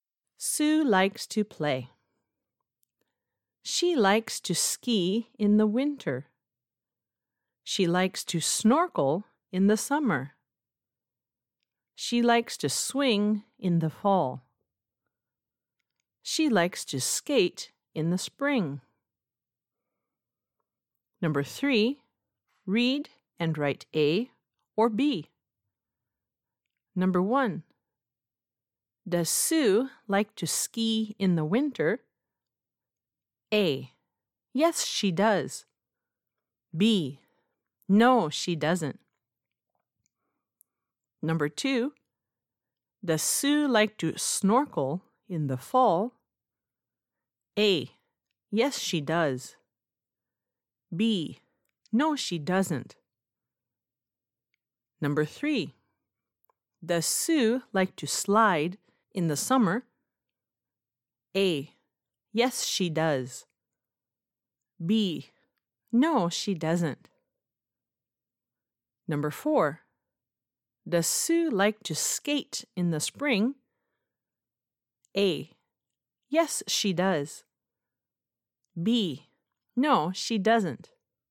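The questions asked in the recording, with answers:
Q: Does Sue like to ski in the winter?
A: A: Yes, she does.

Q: Does Sue like to snorkel in the fall?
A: B: No, she doesn't.

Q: Does Sue like to slide in the summer?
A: B: No, she doesn't.

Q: Does Sue like to skate in the spring?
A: A: Yes, she does.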